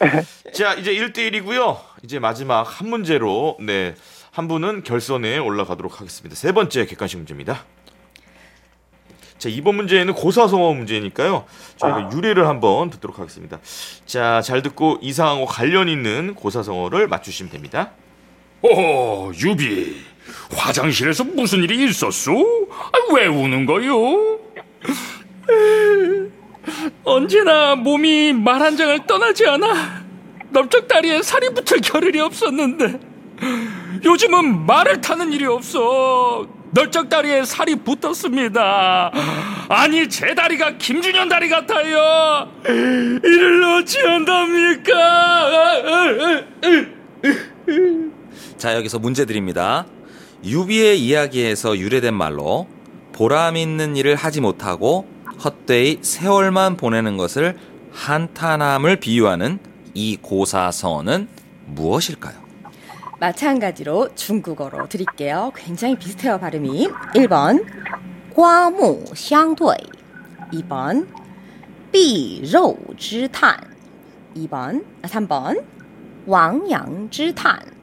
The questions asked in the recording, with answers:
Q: 유비의 이야기에서 유래된 말로 보람 있는 일을 하지 못하고 헛되이 세월만 보내는 것을 한탄함을 비유하는 이 고사성어는 무엇일까요?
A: 2번! 정답입니다.